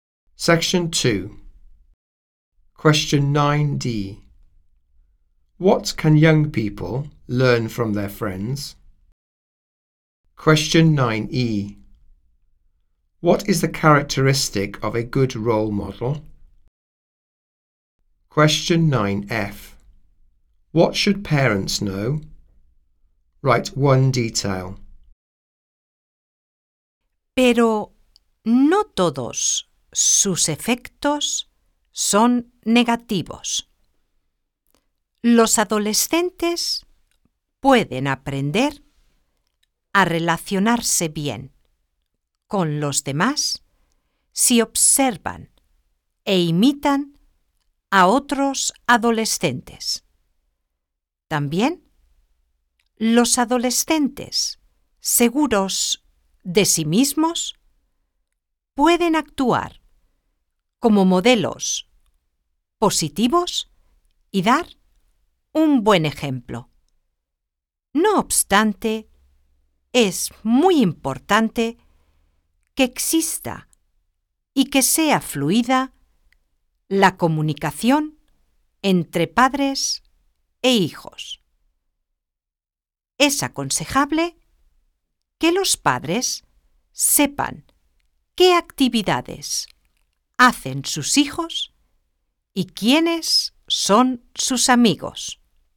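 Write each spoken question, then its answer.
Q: What can young people learn from their friends?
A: To relate well to others

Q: What is the characteristic of a good role model?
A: Self-confident

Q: What should parents know?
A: What activities their children do and who their friends are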